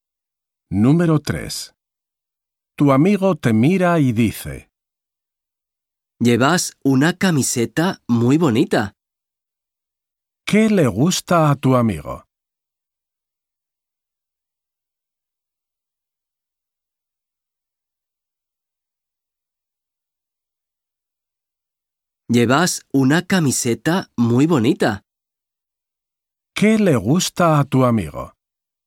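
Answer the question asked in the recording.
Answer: tu camiseta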